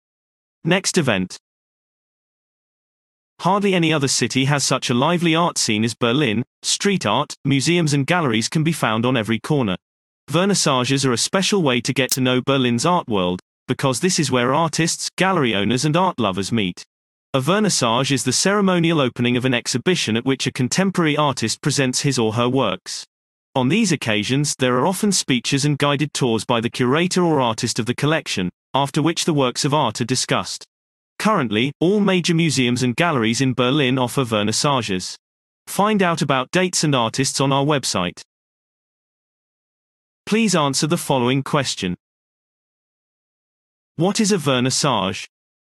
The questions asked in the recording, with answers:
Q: What is a vernissage?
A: A vernissage is the formal opening of an exhibition at which a contemporary artist presents his or her work.